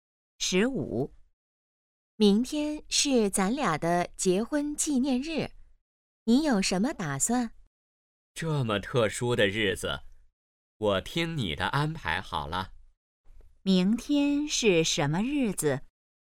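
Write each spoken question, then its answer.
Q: 明天是什么日子?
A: 结婚纪念日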